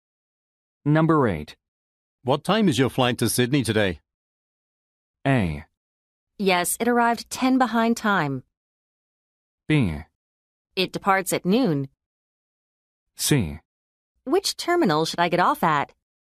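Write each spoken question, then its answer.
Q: What time is your flight to Sydney today?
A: B: It departs at noon.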